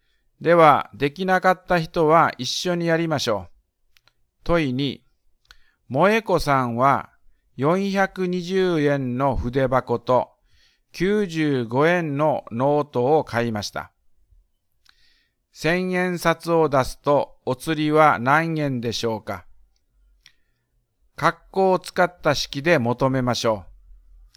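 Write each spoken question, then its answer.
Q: 1000円札を出すと、お釣りは何円でしょうか?括弧を使った式で求めましょう。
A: 1000-(420+95)=485円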